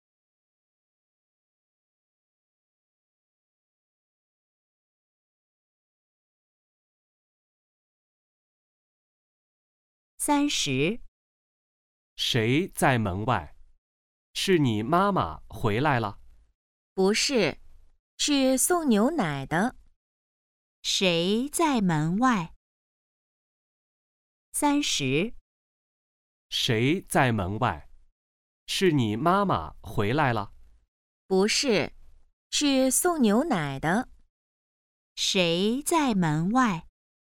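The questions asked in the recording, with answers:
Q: 谁在门外?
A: 送牛奶的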